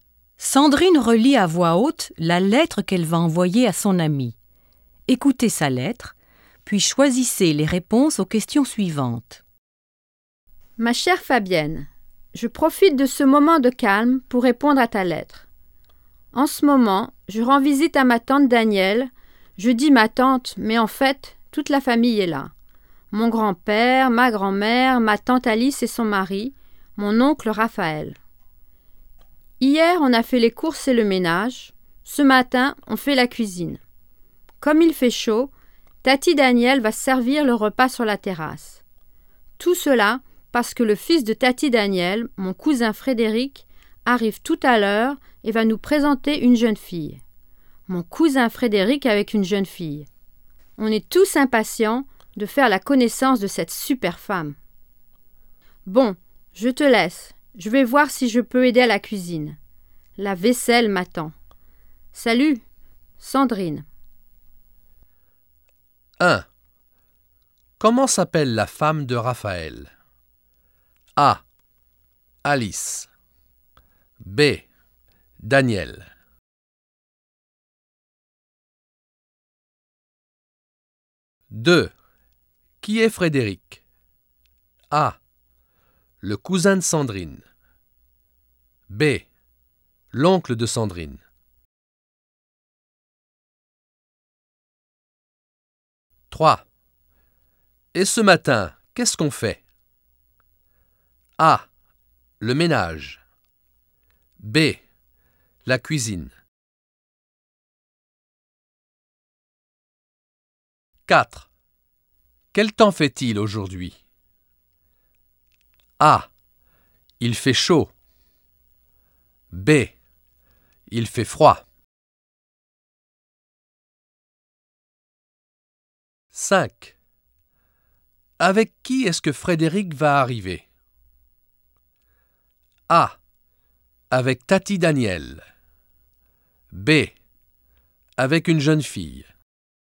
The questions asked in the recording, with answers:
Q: Comment s'appelle la femme de Raphaël?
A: 1. A.

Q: Qui est Frédéric?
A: 2. A.

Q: Et ce matin, qu'est-ce qu'on fait?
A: 3. B.

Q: Quel temps fait-il aujourd'hui?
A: 4. A.

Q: Avec qui est-ce que Frédéric va arriver?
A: 5. B.